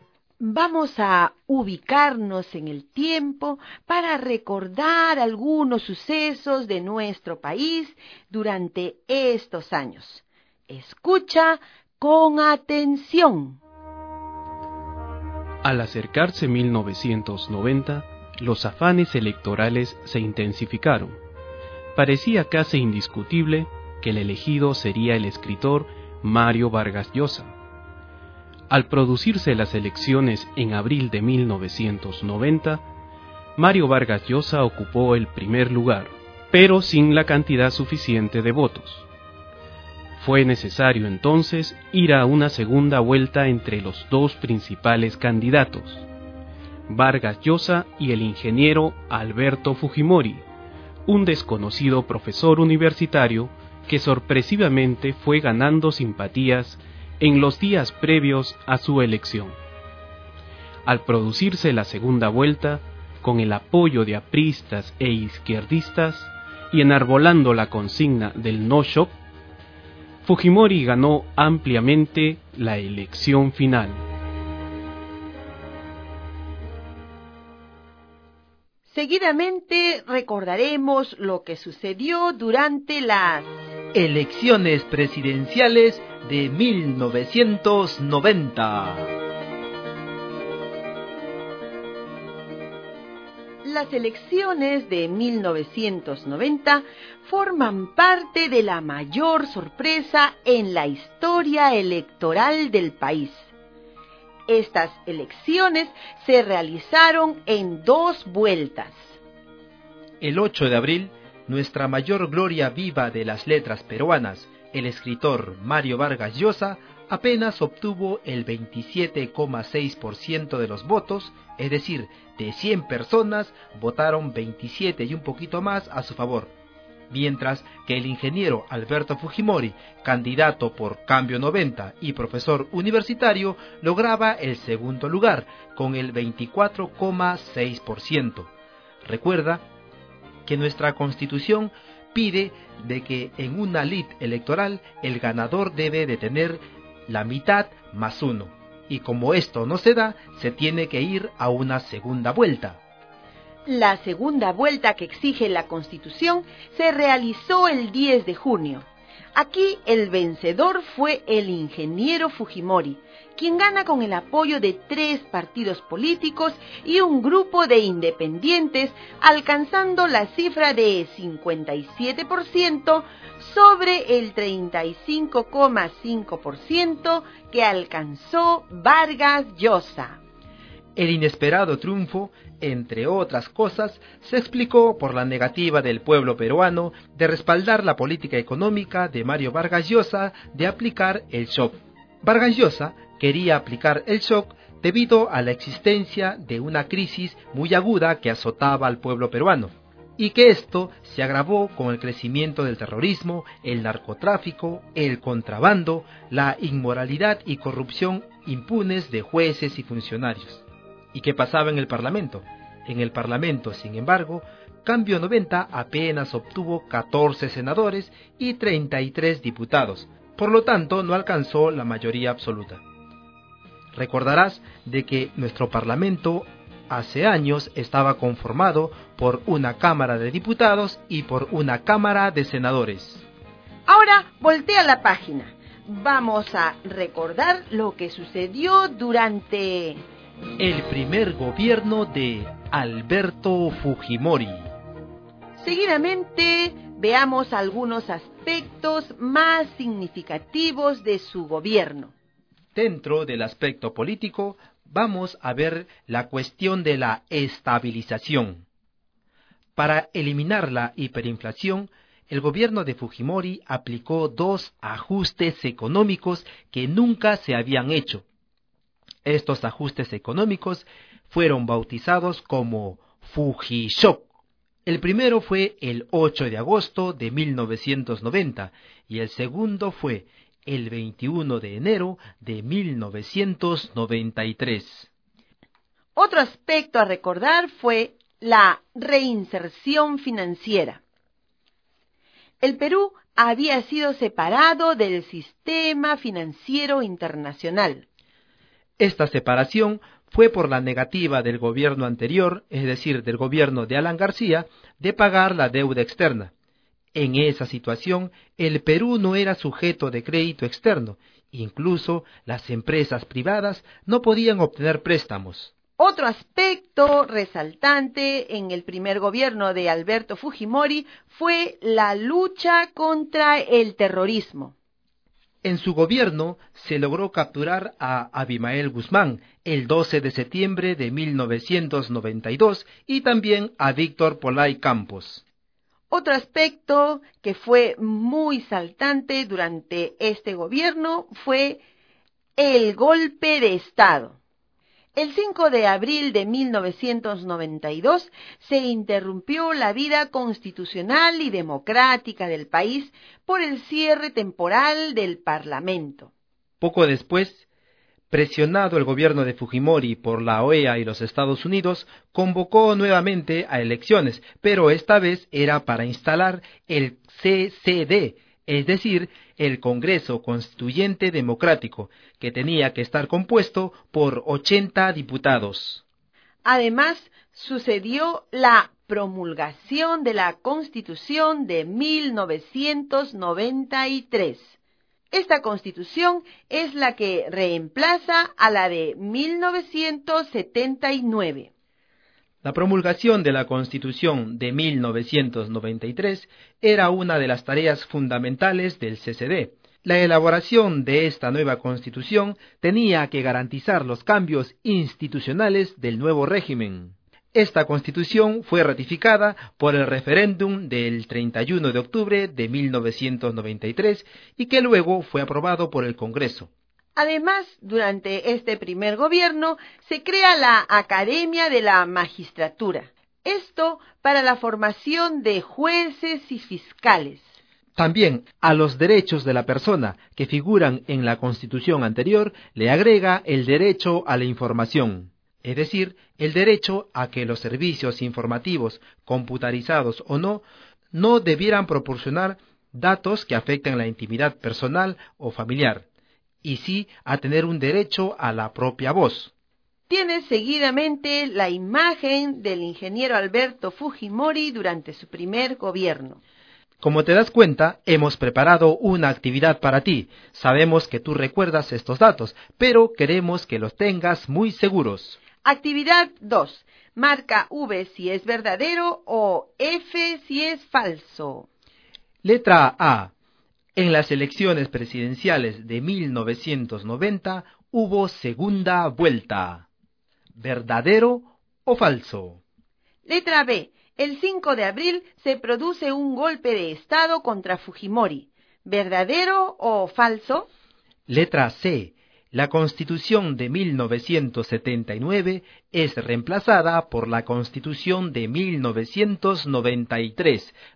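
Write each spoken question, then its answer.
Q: Letra A. En las elecciones presidenciales de 1990 hubo segunda vuelta.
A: Verdadero

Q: Letra B. El 5 de abril se produce un golpe de Estado contra Fujimori.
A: Falso

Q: Letra C. La Constitución de 1979 es reemplazada por la Constitución de 1993.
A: Verdadero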